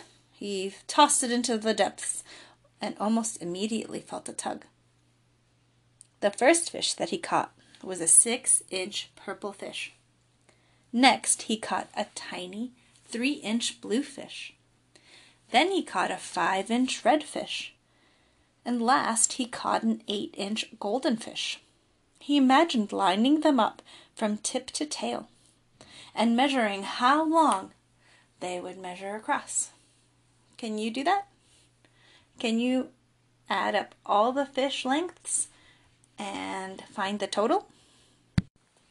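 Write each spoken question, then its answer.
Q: Can you add up all the fish lengths and find the total?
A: 22 inches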